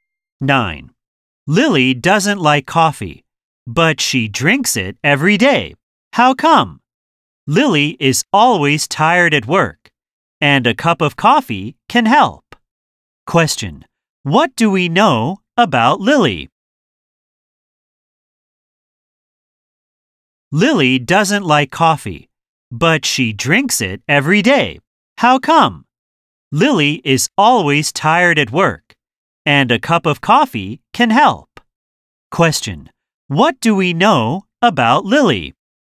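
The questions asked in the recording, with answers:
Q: What do we know about Lily?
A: She drinks coffee every day though she doesn't like it, because she is tired at work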